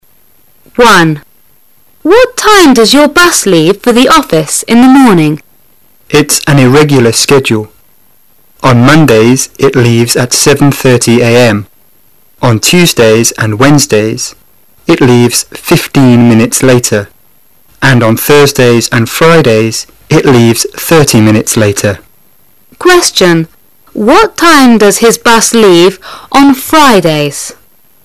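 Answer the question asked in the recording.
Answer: 8:00 a.m.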